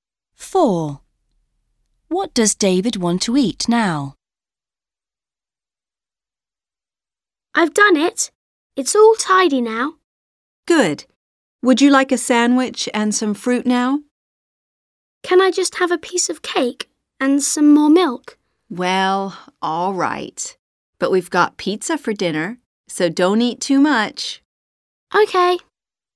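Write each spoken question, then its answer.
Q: What does David want to eat now?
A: A piece of cake (and some more milk)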